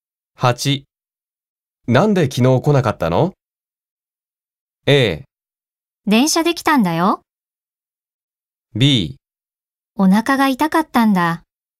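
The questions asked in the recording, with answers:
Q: なんで昨日来なかったの?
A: B: お腹が痛かったんだ。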